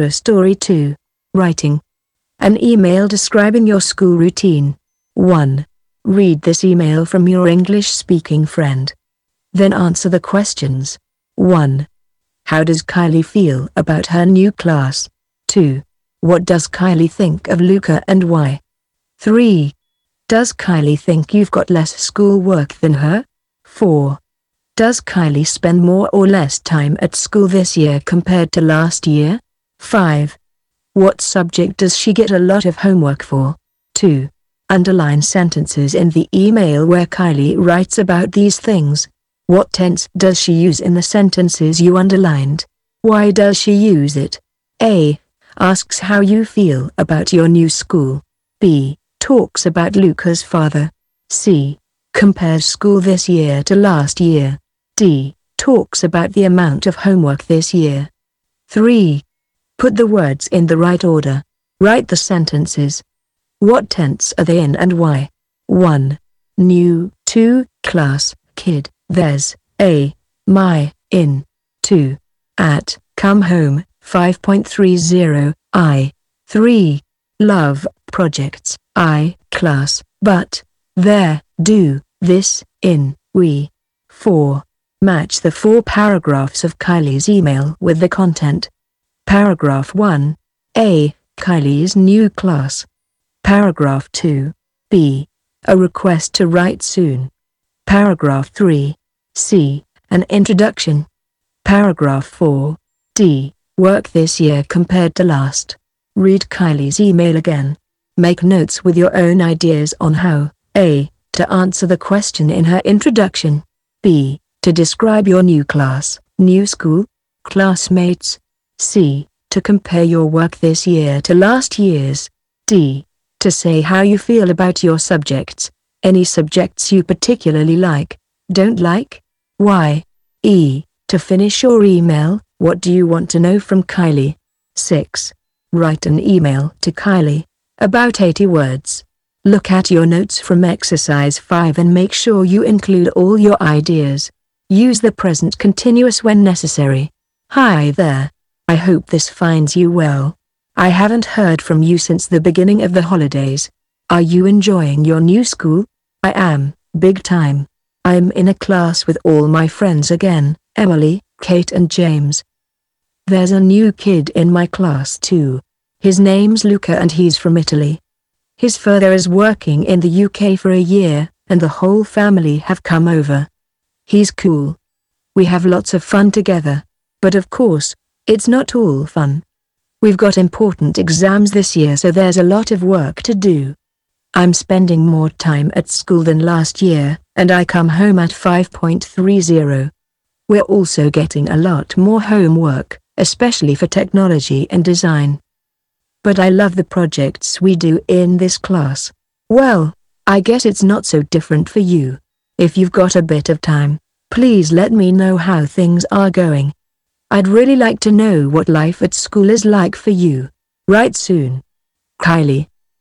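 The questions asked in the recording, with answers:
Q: How does Kylie feel about her new class?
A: She's happy because she's in a class with all her friends again

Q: What does Kylie think of Luca and why?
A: He's cool; they have lots of fun together

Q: Does Kylie think you've got less schoolwork than her?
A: No, she guesses it's not so different for you

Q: Does Kylie spend more or less time at school this year compared to last year?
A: More

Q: What subject does she get a lot of homework for?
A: Technology and design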